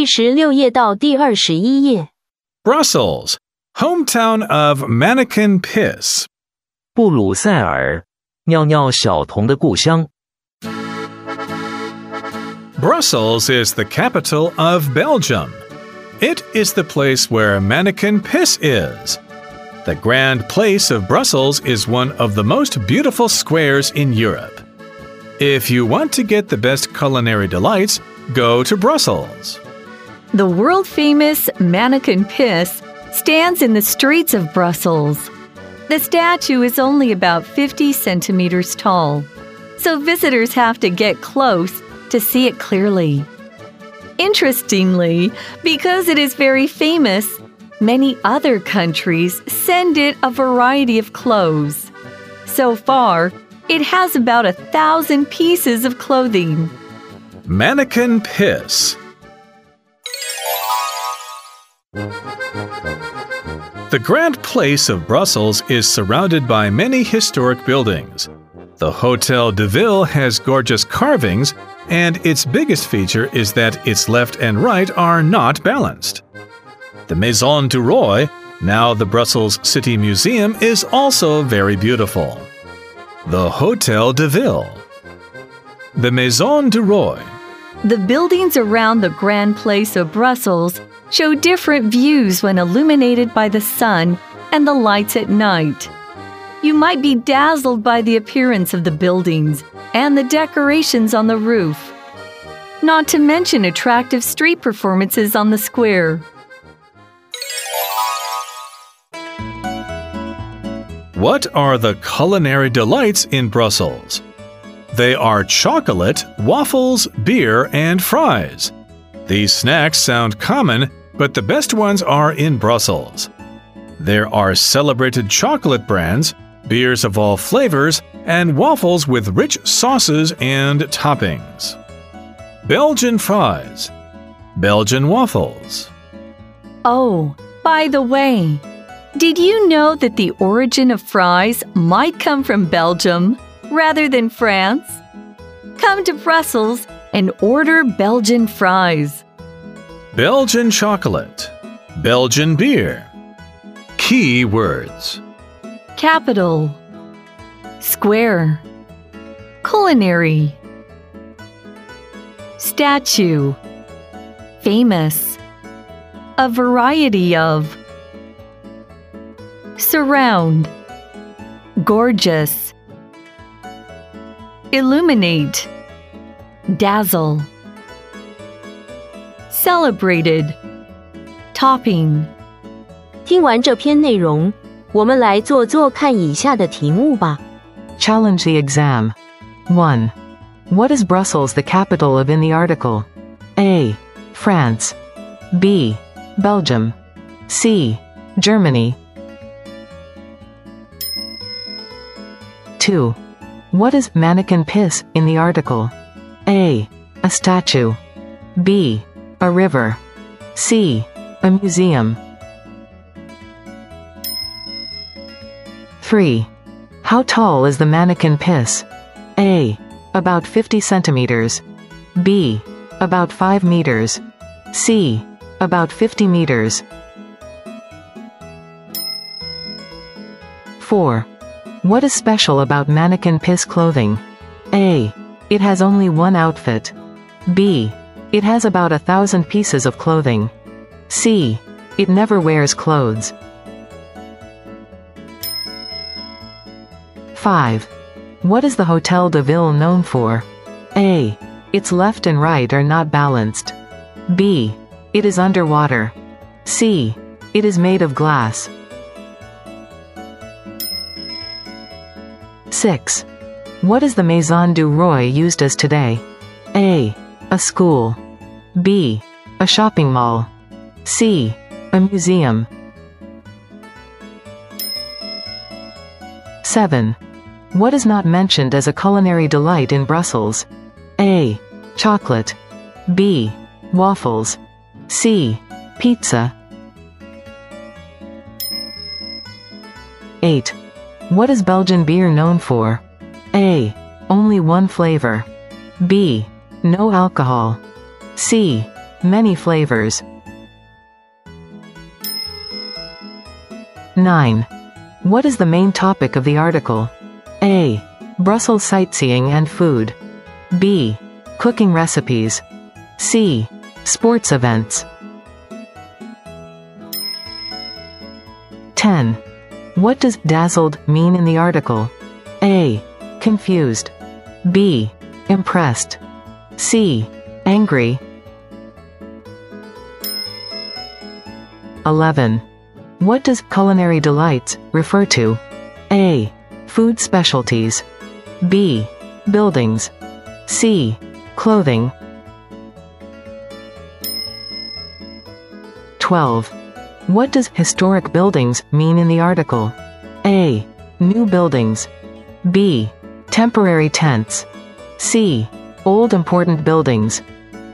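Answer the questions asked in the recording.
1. B: Belgium
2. A: A statue
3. A: About 50 centimeters
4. B: It has about 1,000 pieces of clothing
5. A: Its left and right are not balanced
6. C: A museum
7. C: Pizza
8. C: Many flavors
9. A: Brussels sightseeing and food
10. B: Impressed
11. A: Food specialties
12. C: Old important buildings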